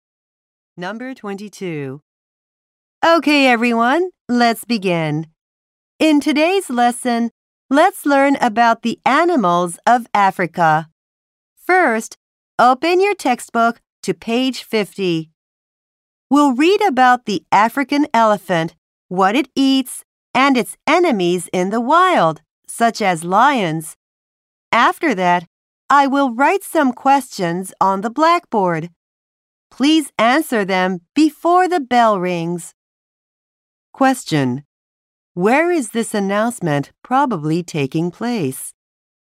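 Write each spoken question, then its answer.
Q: Where is this announcement probably taking place?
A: In a classroom (at school).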